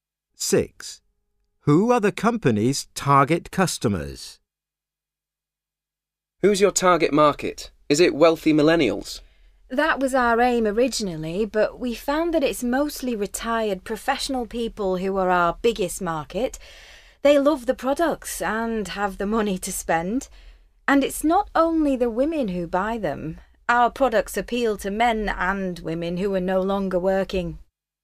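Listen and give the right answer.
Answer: Retired professional people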